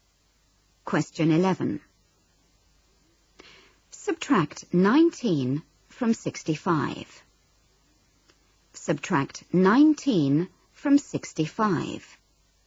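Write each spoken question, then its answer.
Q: Subtract 19 from 65.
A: 46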